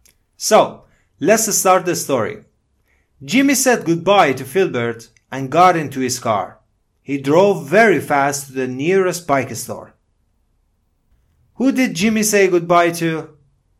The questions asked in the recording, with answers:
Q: Who did Jimmy say goodbye to?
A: Filbert. He said goodbye to Filbert.